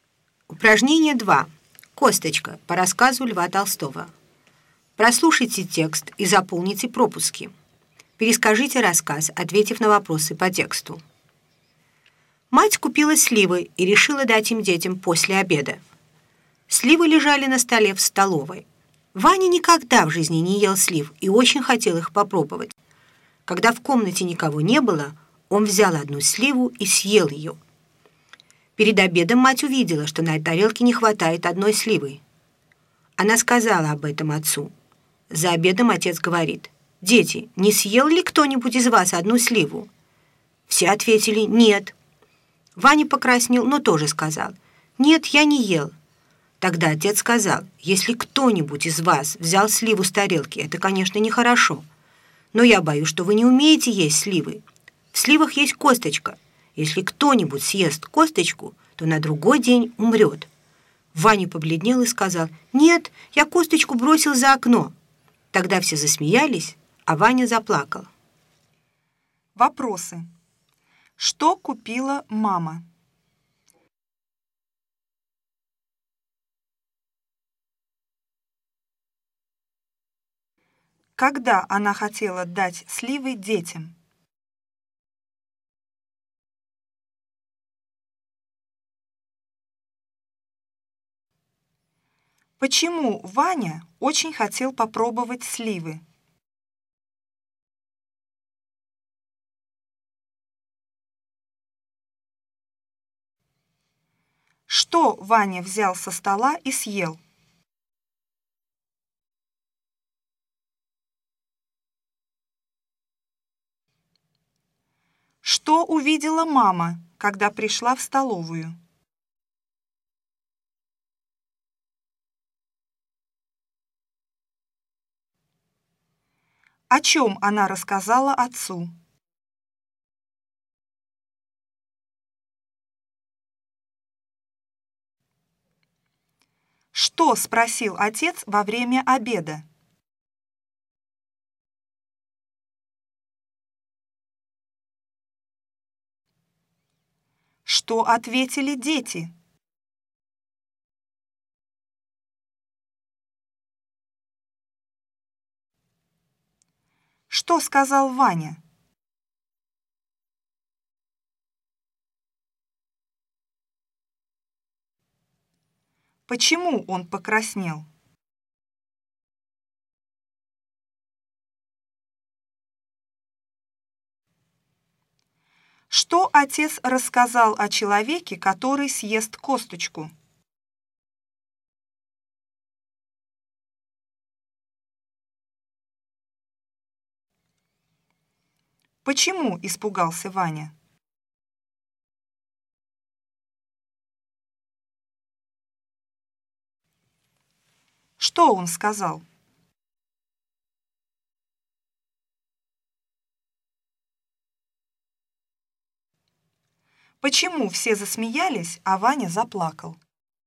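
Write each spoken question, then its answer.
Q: Что купила мама?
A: сливы

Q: Когда она хотела дать сливы детям?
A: после обеда

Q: Почему Ваня очень хотел попробовать сливы?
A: он никогда в жизни не ел слив

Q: Что Ваня взял со стола и съел?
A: одну сливу

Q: Что увидела мама, когда пришла в столовую?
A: что на тарелке не хватает одной сливы

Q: О чем она рассказала отцу?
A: что не хватает одной сливы

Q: Что спросил отец во время обеда?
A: не съел ли кто-нибудь из детей одну сливу

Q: Что ответили дети?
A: Нет

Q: Что сказал Ваня?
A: Нет, я не ел

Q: Почему он покраснел?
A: потому что он съел сливу и солгал

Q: Что отец рассказал о человеке, который съест косточку?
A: что на другой день он умрет

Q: Почему испугался Ваня?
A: боялся, что умрет, если съел косточку

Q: Что он сказал?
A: Нет, я косточку бросил за окно

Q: Почему все засмеялись, а Ваня заплакал?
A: Ваня сам выдал, что съел сливу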